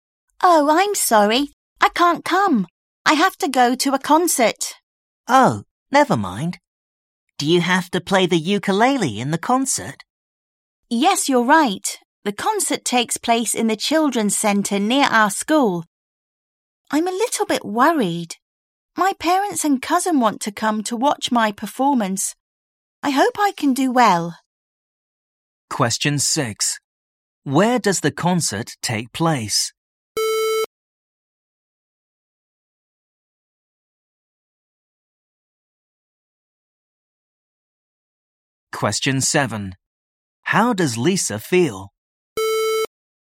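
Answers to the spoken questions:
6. In the children's centre near their school
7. A little bit worried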